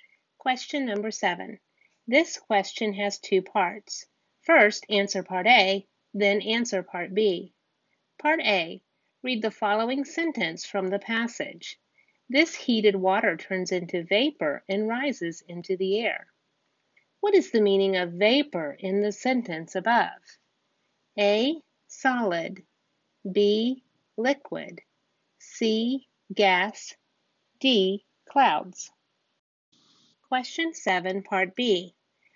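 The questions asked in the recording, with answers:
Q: What is the meaning of vapor in the sentence above?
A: C: gas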